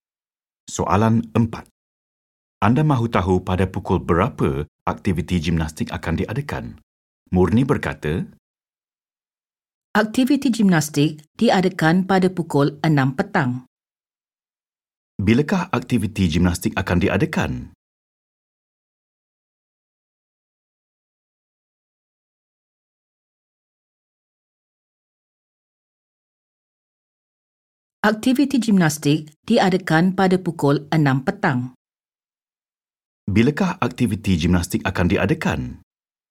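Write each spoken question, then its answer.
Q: Bilakah aktiviti gimnastik akan diadakan?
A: pukul 6 petang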